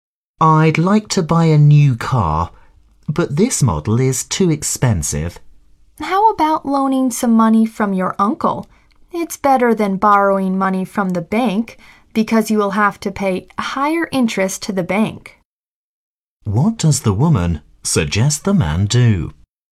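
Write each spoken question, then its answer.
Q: What does the woman suggest the man do?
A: Borrow money from his uncle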